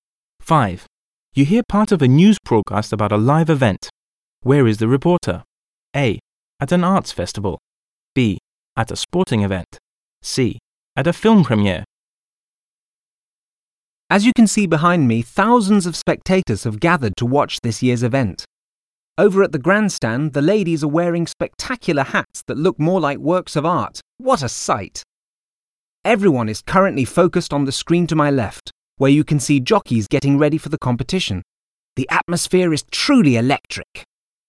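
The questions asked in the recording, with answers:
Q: Where is the reporter?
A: B: At a sporting event.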